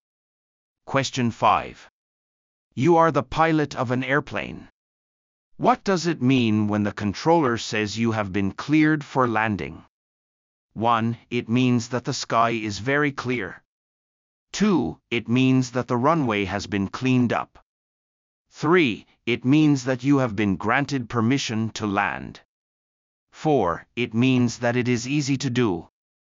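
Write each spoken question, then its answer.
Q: What does it mean when the controller says you have been cleared for landing?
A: 3: It means that you have been granted permission to land.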